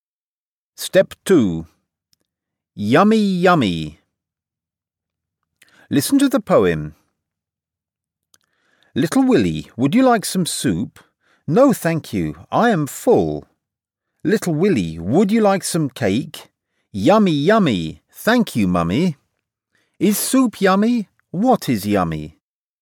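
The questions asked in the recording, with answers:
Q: What is yummy?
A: The cake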